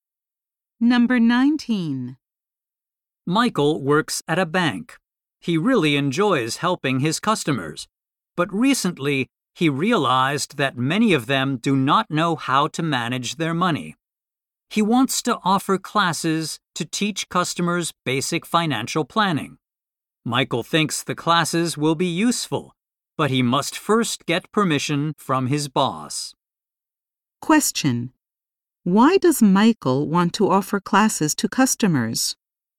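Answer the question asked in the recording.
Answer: Many customers do not know how to manage their money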